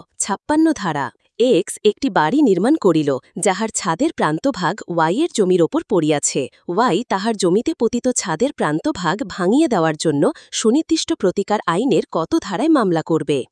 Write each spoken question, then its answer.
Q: Y তাহার জমিতে পতিত ছাদের প্রান্তভাগ ভাঙিয়ে দেওয়ার জন্য সুনির্দিষ্ট প্রতিকার আইনের কত ধারায় মামলা করবে?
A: 55 ধারায়।